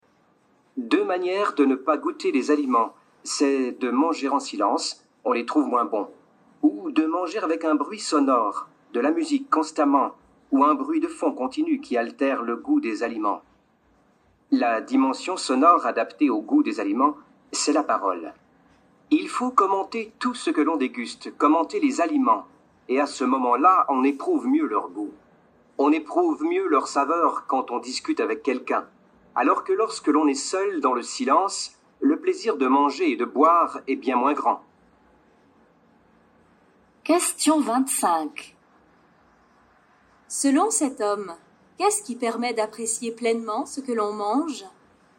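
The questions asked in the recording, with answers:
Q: Selon cet homme, qu'est-ce qui permet d'apprécier pleinement ce que l'on mange ?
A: Parler, commenter les aliments en discutant avec quelqu'un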